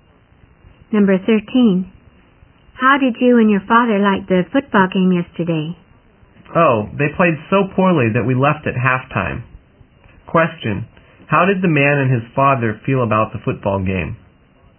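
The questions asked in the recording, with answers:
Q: How did the man and his father feel about the football game?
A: They were disappointed because the teams played poorly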